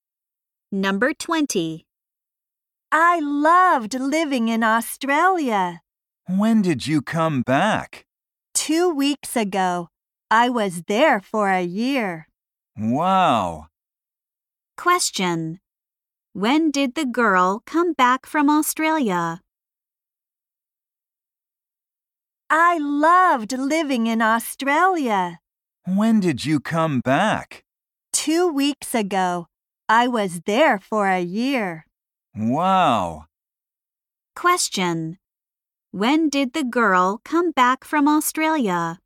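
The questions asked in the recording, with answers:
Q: When did the girl come back from Australia?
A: Two weeks ago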